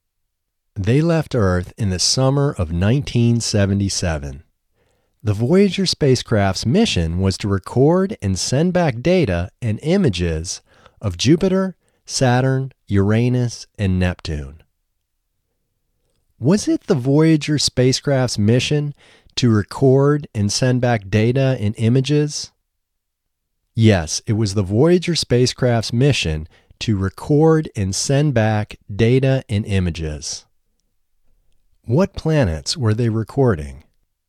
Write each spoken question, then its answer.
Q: What planets were they recording?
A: They were recording Jupiter, Saturn, Uranus, and Neptune.